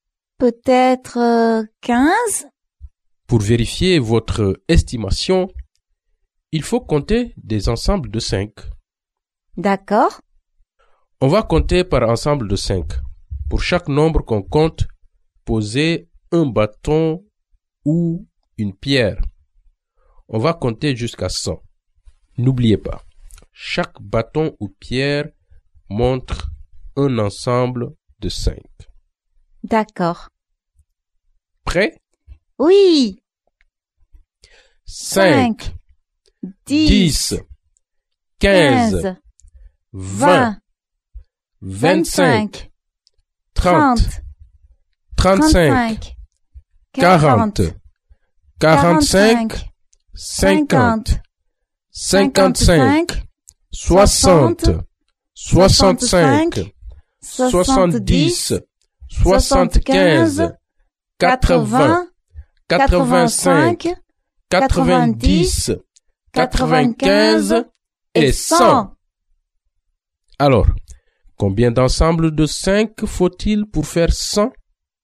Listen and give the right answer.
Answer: Il faut 20 ensembles de 5 pour faire 100.